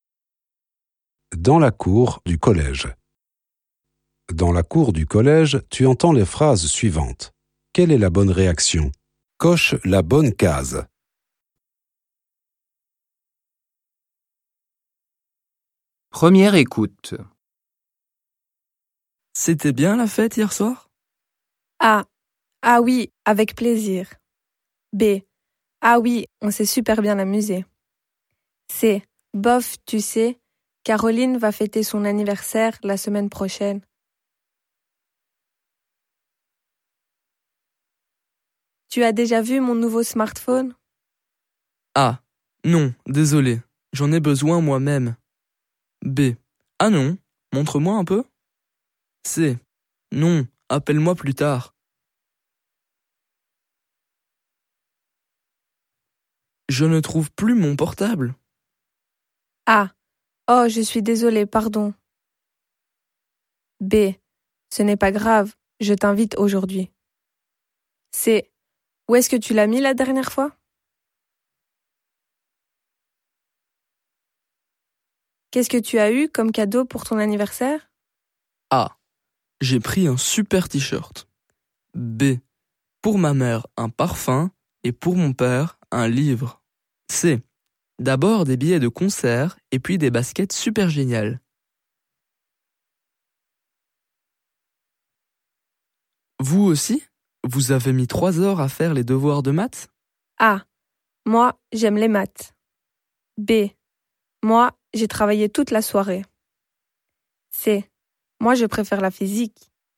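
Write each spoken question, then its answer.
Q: C'était bien la fête hier soir ?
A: B: Ah oui, on s'est super bien amusé.

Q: Tu as déjà vu mon nouveau smartphone ?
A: B: Ah non, montre-moi un peu.

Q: Je ne trouve plus mon portable.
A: C: Où est-ce que tu l'as mis la dernière fois ?

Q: Qu'est-ce que tu as eu comme cadeau pour ton anniversaire ?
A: C: D'abord des billets de concert et puis des baskets super géniales.

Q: Vous aussi ? Vous avez mis 3 heures à faire les devoirs de maths ?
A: B: Moi, j'ai travaillé toute la soirée.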